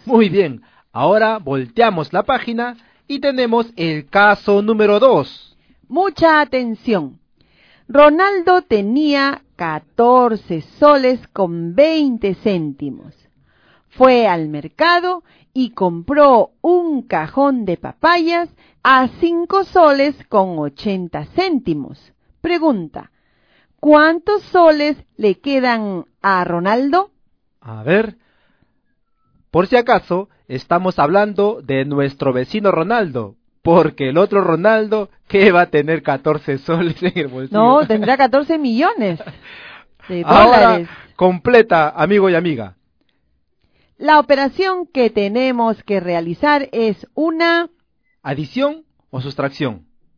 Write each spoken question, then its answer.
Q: Pregunta, ¿cuántos soles le quedan a Ronaldo?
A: A Ronaldo le quedan 8 soles con 40 céntimos.

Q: ¿Adición o sustracción?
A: Vamos a realizar la operación de la sustracción o una resta.